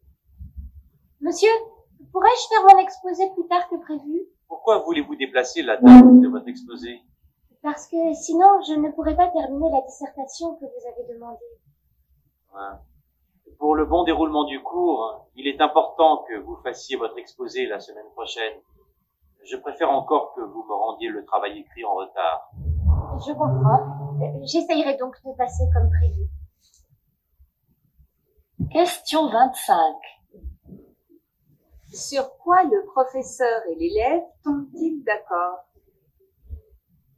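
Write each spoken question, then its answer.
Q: Sur quoi le professeur et l'élève tombent-ils d'accord?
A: L'élève fera son exposé comme prévu la semaine prochaine et rendra la dissertation en retard.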